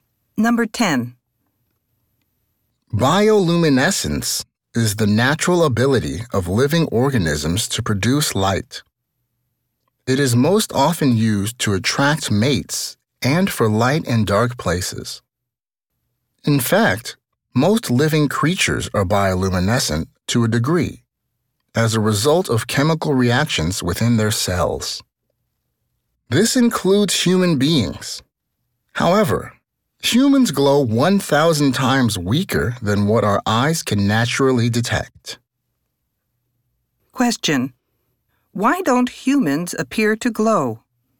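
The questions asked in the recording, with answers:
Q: Why don't humans appear to glow?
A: Their glow is 1,000 times weaker than what our eyes can detect.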